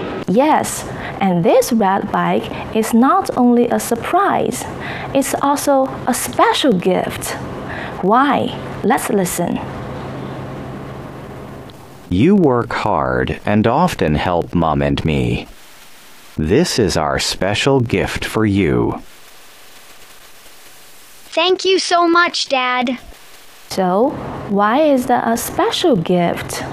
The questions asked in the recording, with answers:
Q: So, why is that a special gift?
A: Because Ben works hard and often helps his parents.